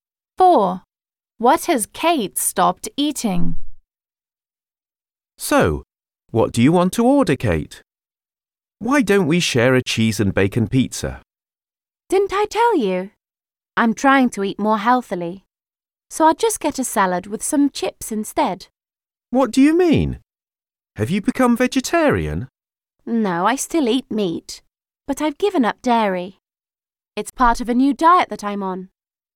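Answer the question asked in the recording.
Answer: Dairy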